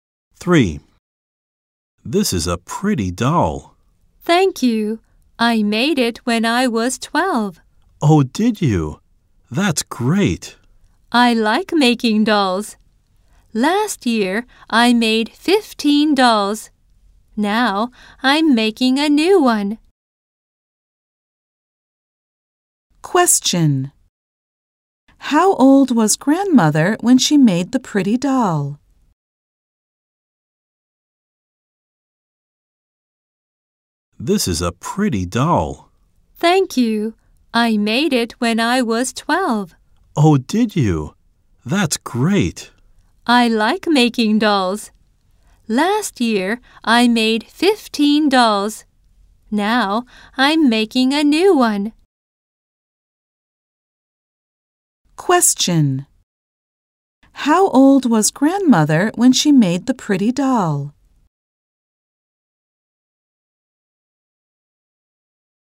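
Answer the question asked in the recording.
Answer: 12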